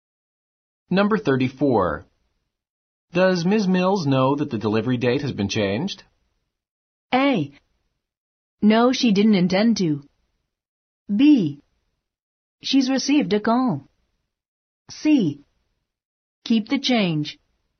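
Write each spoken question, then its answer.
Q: Does Ms. Mills know that the delivery date has been changed?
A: B: She's received a call.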